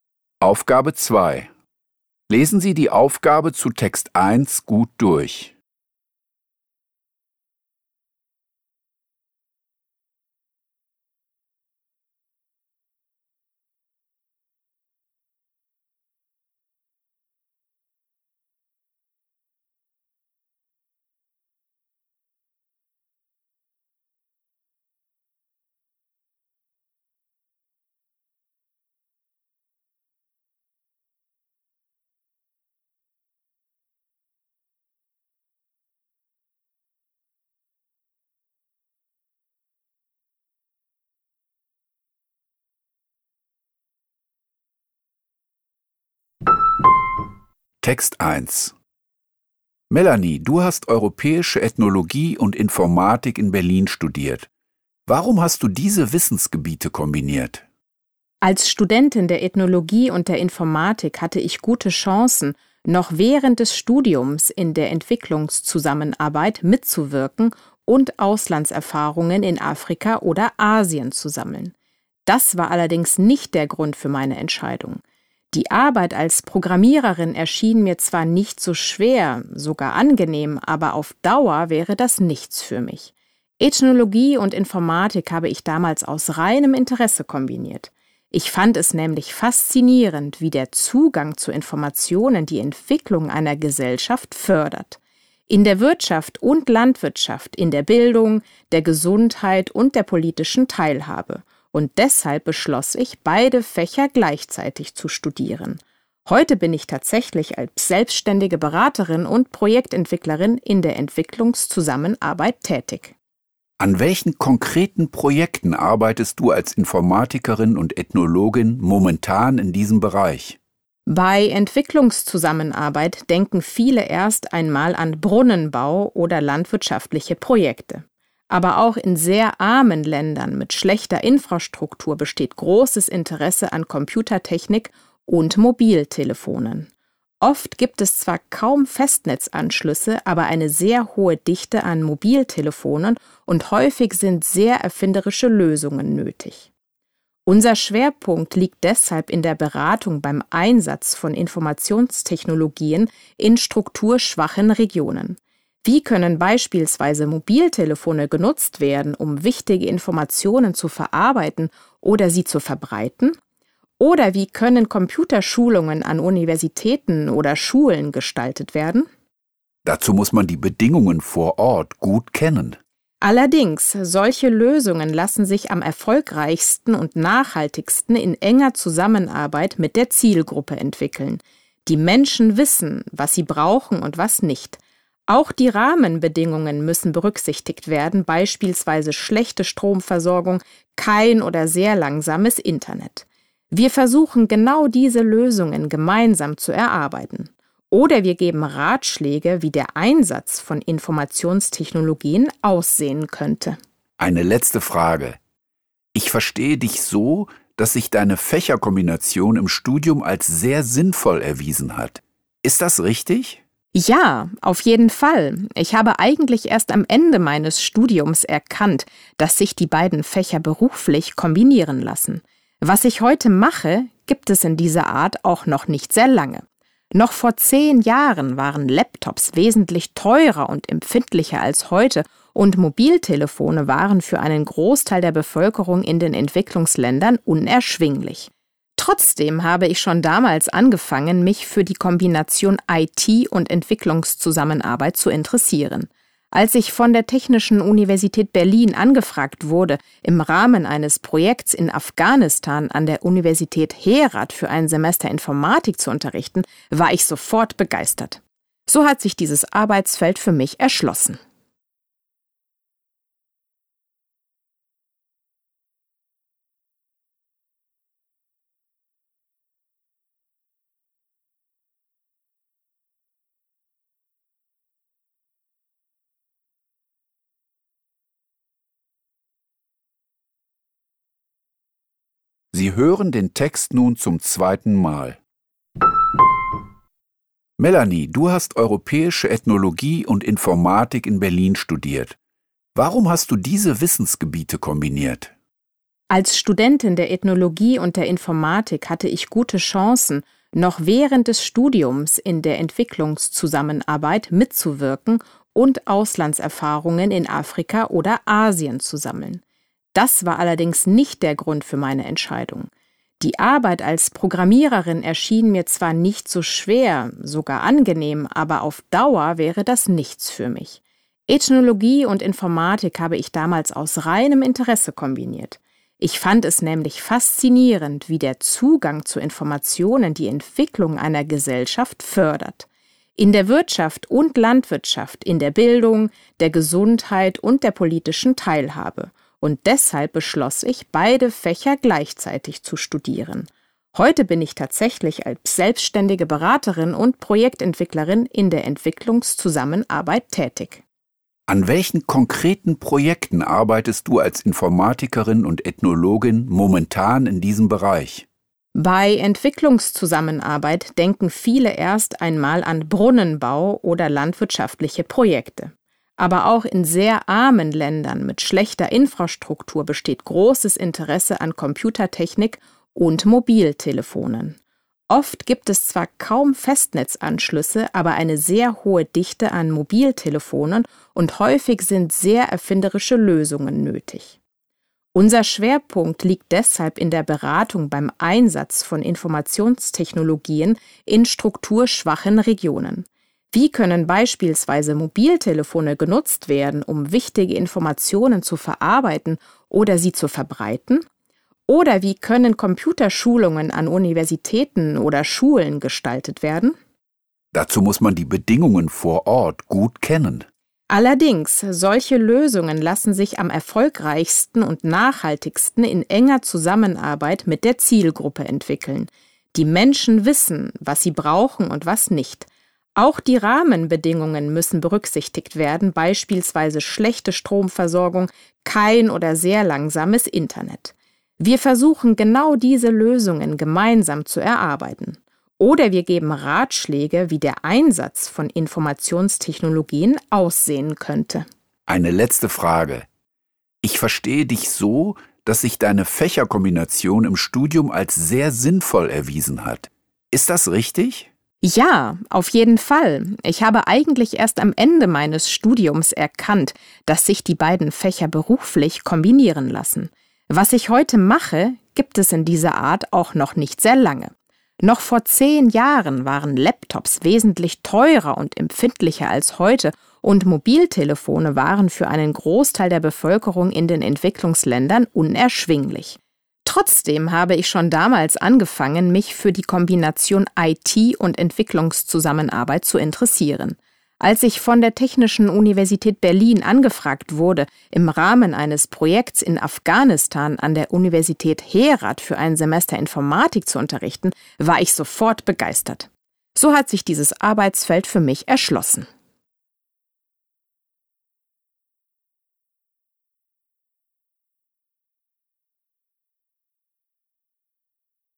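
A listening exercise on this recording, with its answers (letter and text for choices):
Hören Sie die folgenden zwei Texte, über Entwicklungszusammenarbeit und über Pferde im Zirkus, zweimal. Kreuzen Sie die jeweils richtige Antwort (A, B, C oder D) an. Nur jeweils eine Antwort ist richtig. Die Aufgaben 2.1–2.3 betreffen den ersten Text, die Aufgaben 2.4–2.6 den zweiten Text.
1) Warum entschied sich Melanie, Ethnologie in Verbindung mit Informatik zu studieren?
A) Sie fand den Job als Programmiererin anstrengend.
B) Sie konnte Auslandserfahrungen in Europa sammeln.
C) Sie wollte noch im Studium in der Entwicklungszusammenarbeit tätig sein.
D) Sie fand den Einfluss der Informatik auf die gesellschaftliche Entwicklung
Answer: D) Sie fand den Einfluss der Informatik auf die gesellschaftliche Entwicklung

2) Was steht im Fokus der Projekte von Melanie in den Entwicklungsländern?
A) Die Entwicklung von Apps für Mobiltelefone.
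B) Die Finanzierung von Brunnenbau und Landwirtschaft.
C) Die Nutzungsmöglichkeiten von Informationstechnologien.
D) Der Anschluss von Universitäten und Schulen an das Internet.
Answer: C) Die Nutzungsmöglichkeiten von Informationstechnologien.

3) In der letzten Aussage informiert Melanie darüber,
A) wie sie zu ihrem aktuellen Aufgabenbereich gekommen ist.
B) wie sie im Studium Ethnologie und Informatik kombiniert hat.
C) warum sie an einer Berliner Universität Informatik unterrichtet.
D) was sie durch die Entwicklungszusammenarbeit erreichen will.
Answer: A) wie sie zu ihrem aktuellen Aufgabenbereich gekommen ist.

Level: Poziom: dwujęzyczny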